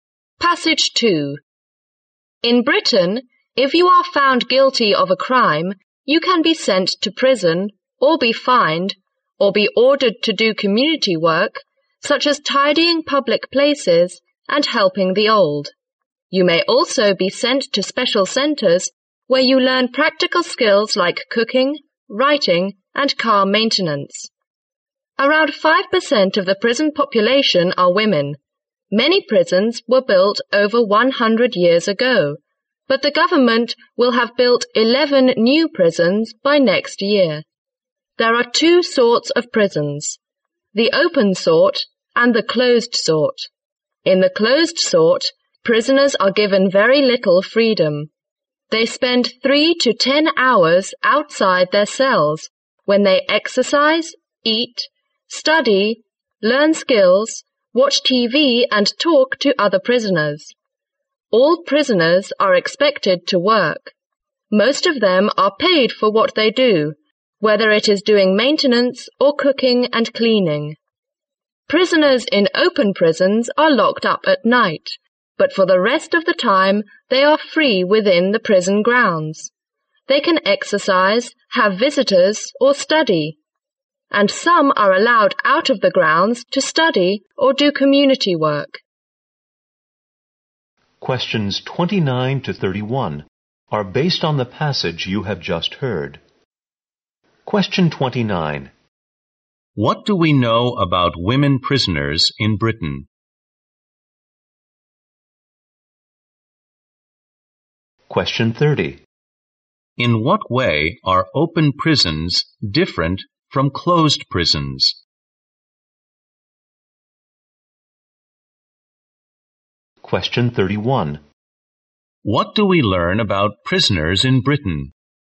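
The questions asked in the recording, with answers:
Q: What do we know about women prisoners in Britain?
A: They make up around 5% of the prison population.

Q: In what way are open prisons different from closed prisons?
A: Prisoners are free within the prison grounds except at night.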